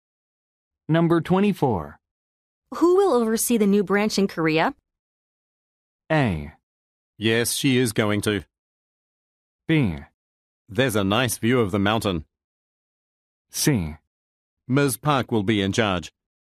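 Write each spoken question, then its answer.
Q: Who will oversee the new branch in Korea?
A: C: Ms. Park will be in charge.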